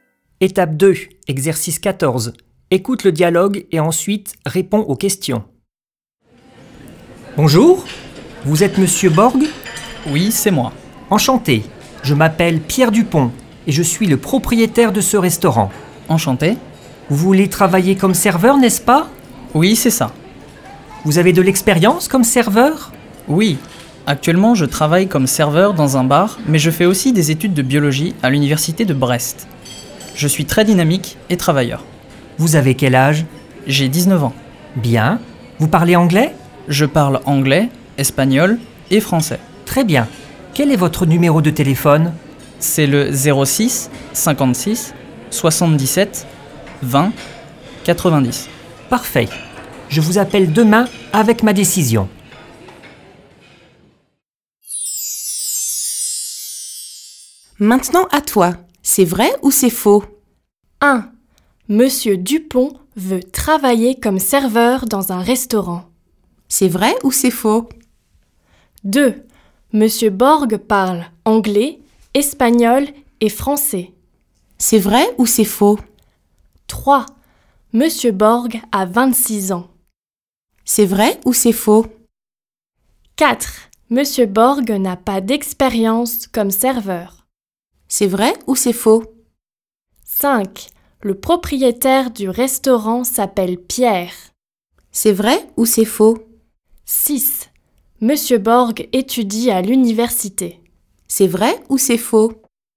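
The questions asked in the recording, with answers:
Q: Monsieur Dupont veut travailler comme serveur dans un restaurant.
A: Faux

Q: Monsieur Borg parle anglais, espagnol et français.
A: Vrai

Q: Monsieur Borg a 26 ans.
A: Faux

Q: Monsieur Borg n'a pas d'expérience comme serveur.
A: Faux

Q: Le propriétaire du restaurant s'appelle Pierre.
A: Vrai

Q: Monsieur Borg étudie à l'université.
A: Vrai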